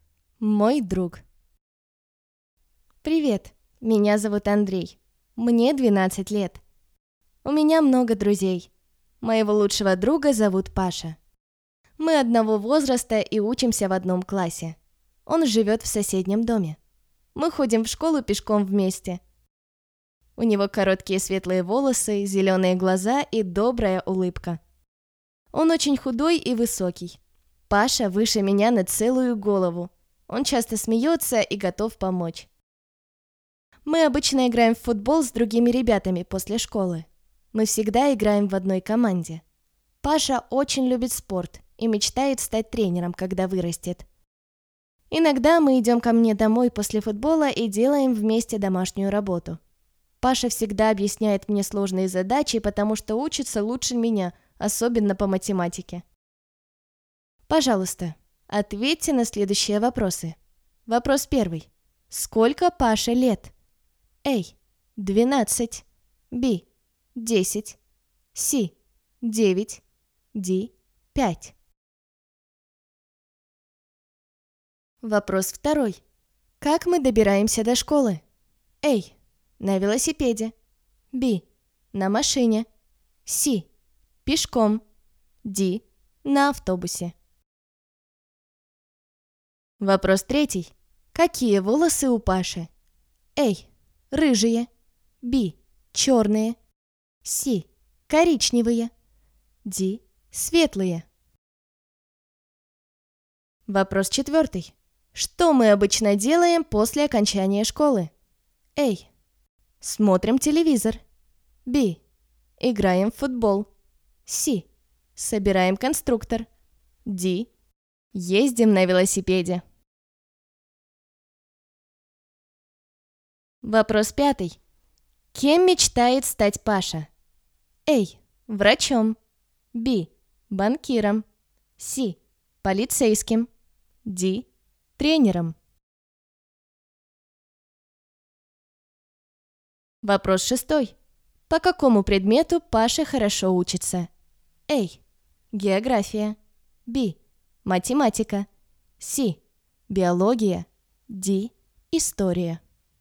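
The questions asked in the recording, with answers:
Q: Сколько Паше лет?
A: A: 12

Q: Как мы добираемся до школы?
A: C: Пешком

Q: Какие волосы у Паши?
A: D: Светлые

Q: Что мы обычно делаем после окончания школы?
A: B: Играем в футбол

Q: Кем мечтает стать Паша?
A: D: Тренером

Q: По какому предмету Паша хорошо учится?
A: B: Математика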